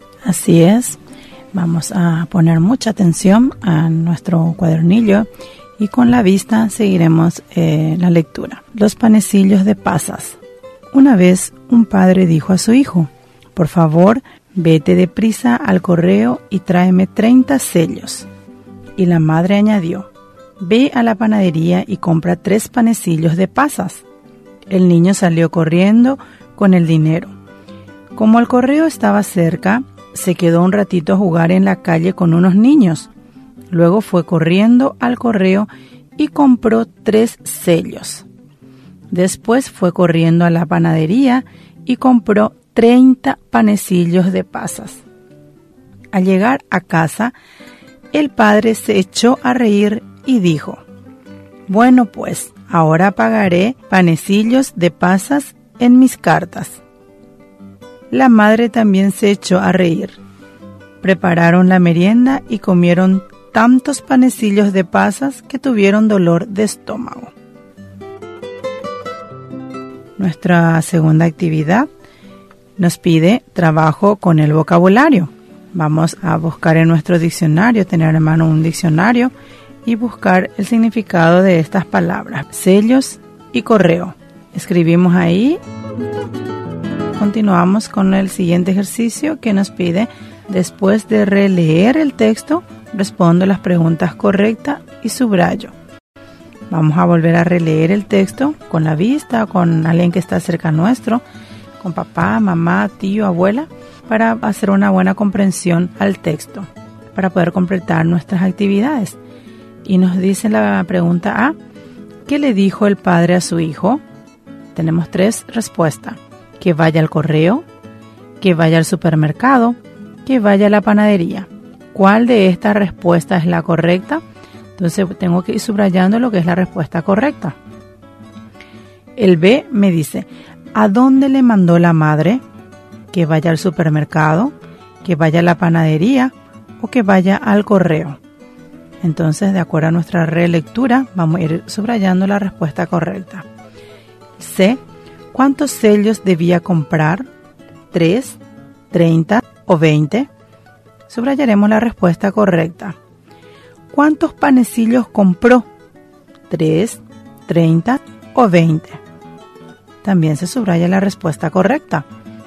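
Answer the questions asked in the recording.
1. Que vaya al correo
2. Que vaya a la panadería
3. 30
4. 30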